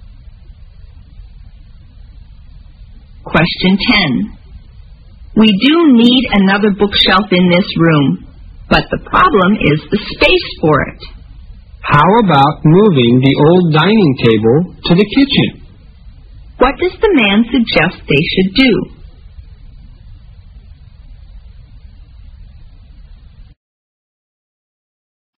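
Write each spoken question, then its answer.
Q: What does the man suggest they should do?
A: Move the old dining table to the kitchen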